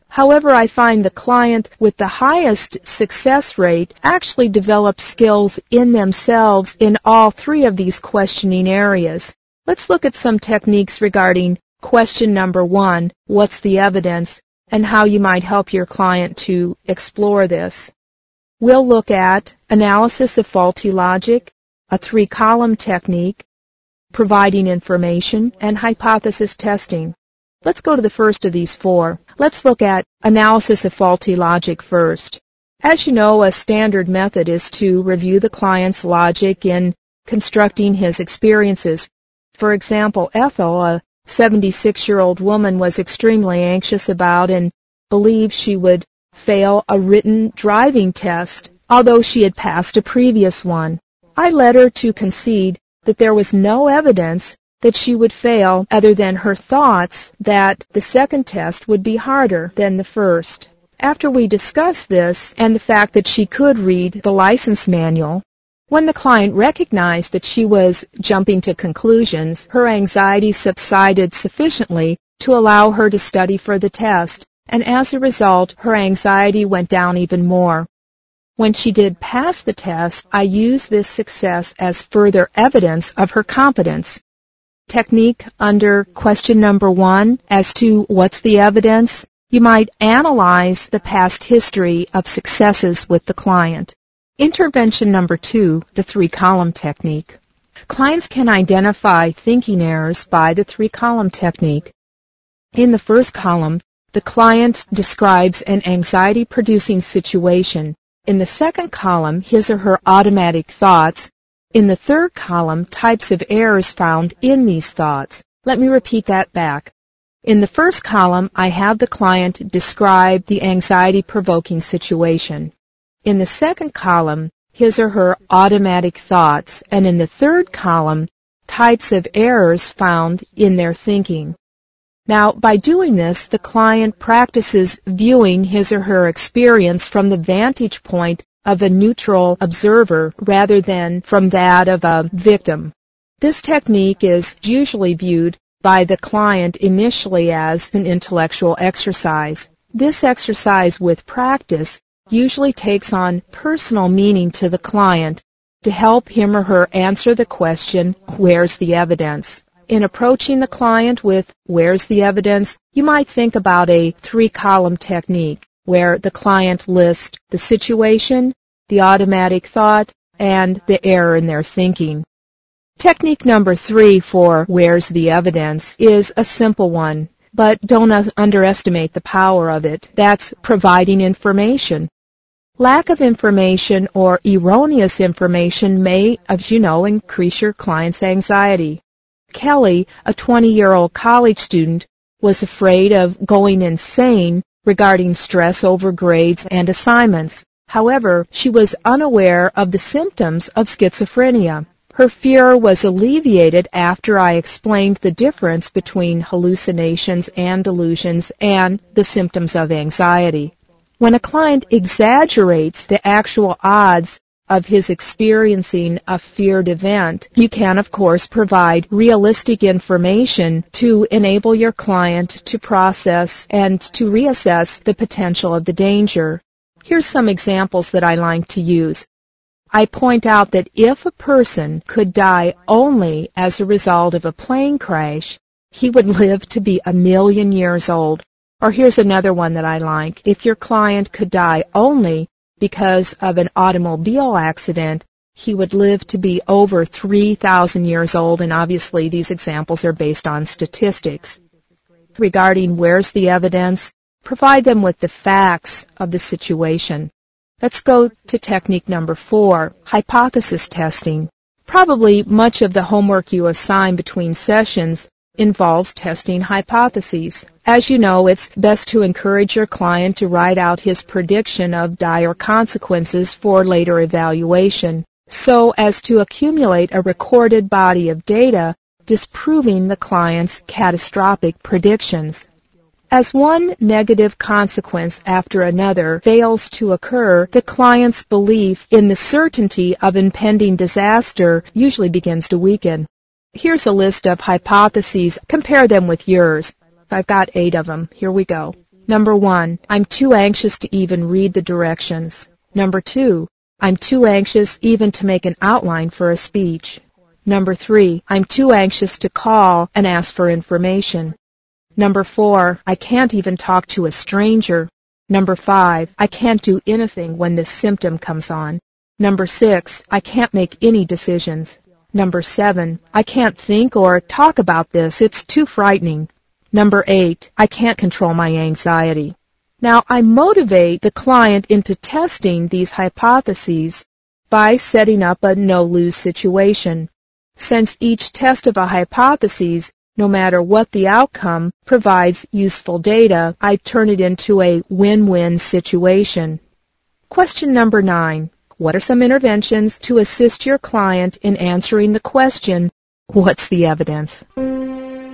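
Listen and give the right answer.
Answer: Analysis of faulty logic, the three-column technique, providing information, and hypothesis testing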